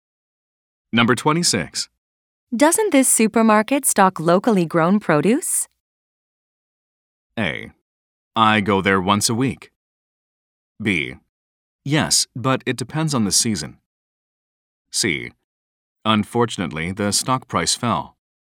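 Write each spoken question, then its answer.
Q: Doesn't this supermarket stock locally grown produce?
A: B: Yes, but it depends on the season.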